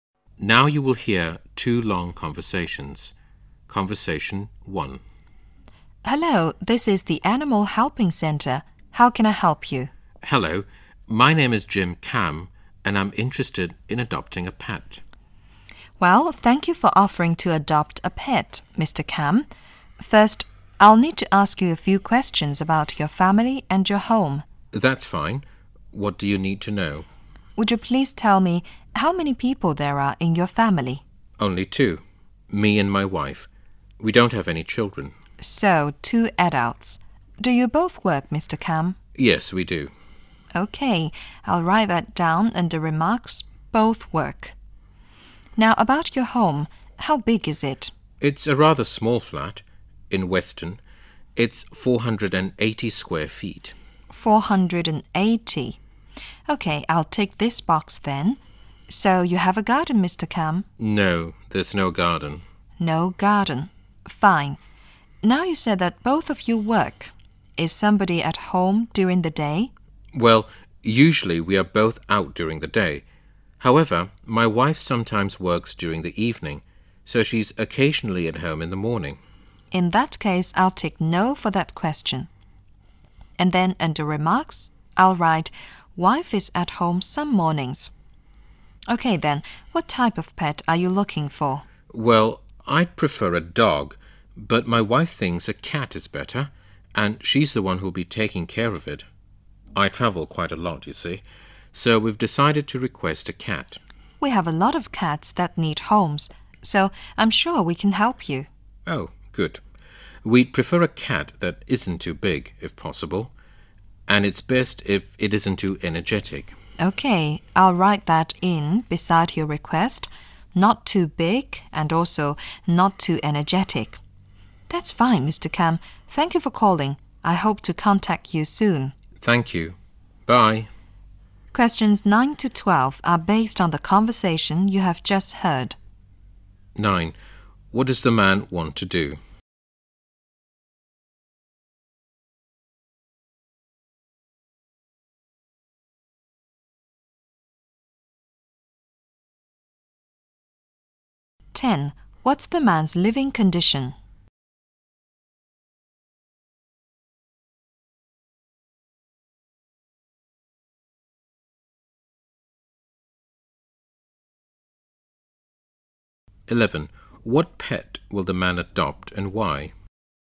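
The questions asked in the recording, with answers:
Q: What does the man want to do?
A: Adopt a pet

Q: What's the man's living condition?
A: A small 480-square-foot flat with no garden

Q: What pet will the man adopt and why?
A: A cat, because his wife will look after it and he travels a lot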